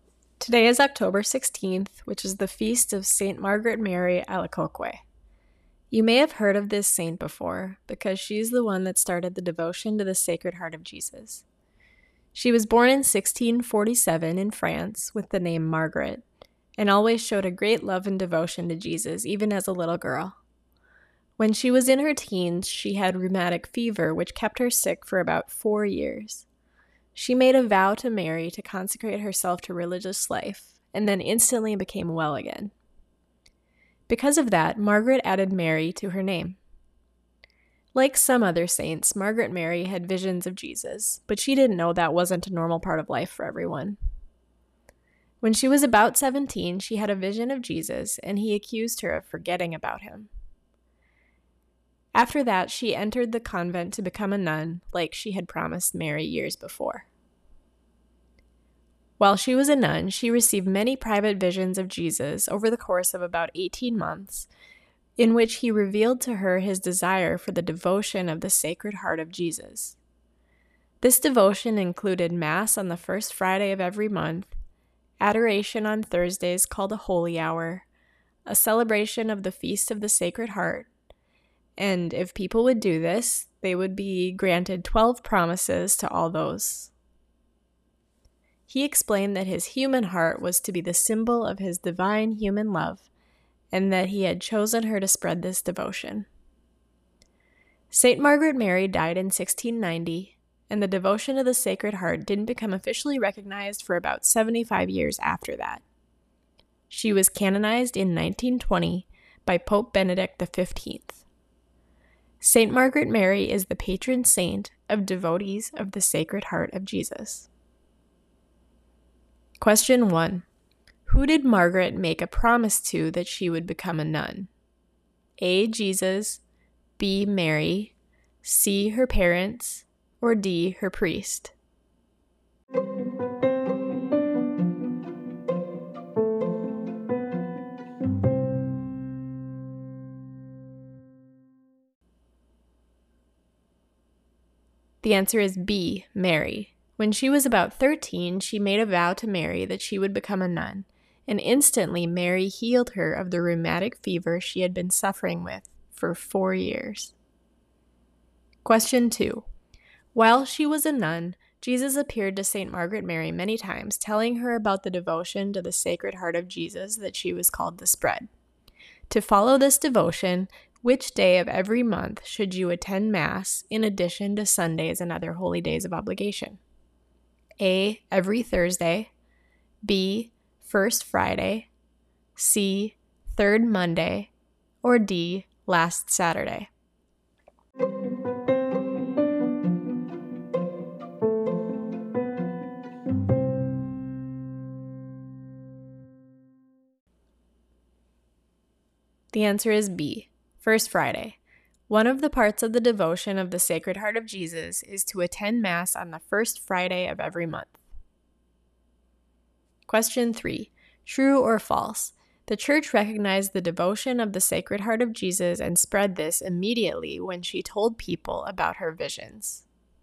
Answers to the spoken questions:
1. The answer is B, Mary.
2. The answer is B. First Friday.
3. That's false.